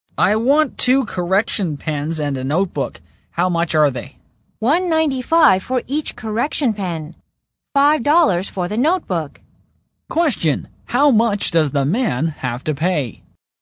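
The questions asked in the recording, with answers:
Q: Question, how much does the man have to pay?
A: $8.90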